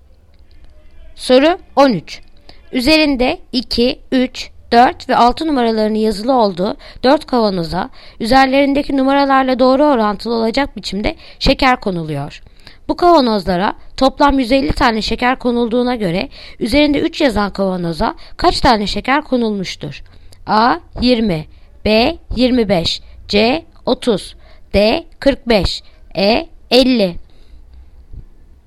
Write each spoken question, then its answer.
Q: Bu kavanozlara toplam 150 tane şeker konulduğuna göre üzerinde 3 yazan kavanoza kaç tane şeker konulmuştur?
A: Yanıt Ceyhan 30